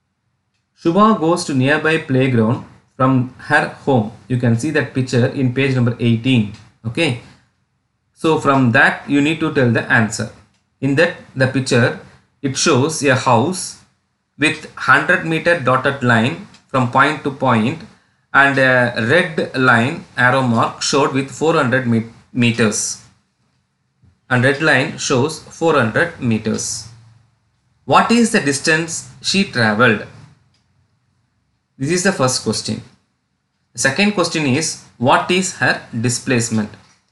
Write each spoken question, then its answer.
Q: What is the distance she traveled?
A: She traveled 400 meters.

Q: what is her displacement?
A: The displacement is mentioned in dotted lines, that is 100 meters.